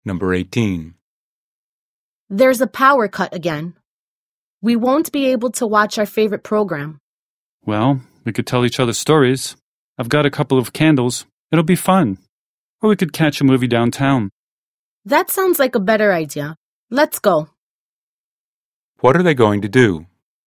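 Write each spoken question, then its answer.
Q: What are they going to do?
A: Go to see a movie downtown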